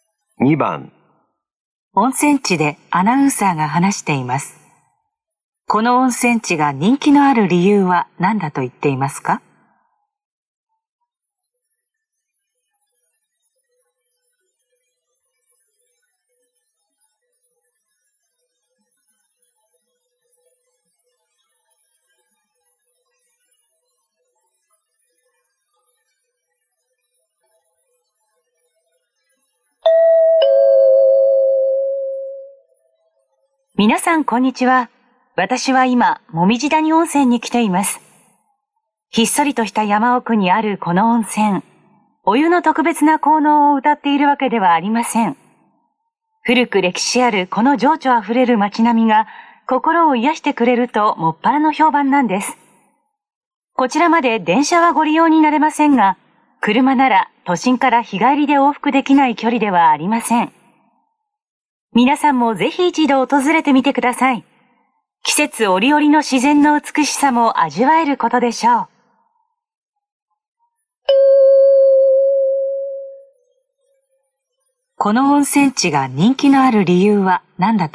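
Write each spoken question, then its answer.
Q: この温泉地が人気のある理由は何だと言っていますか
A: 古い歴史ある情緒あふれる街並みが心を癒してくれるから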